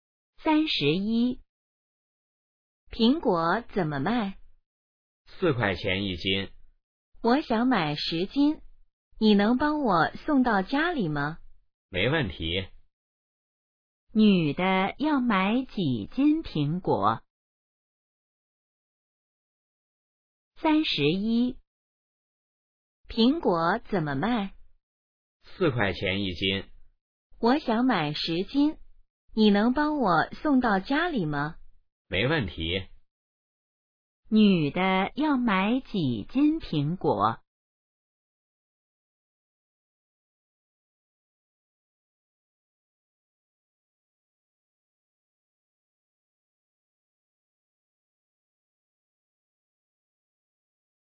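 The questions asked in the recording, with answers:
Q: 女的要买几斤苹果?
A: 10斤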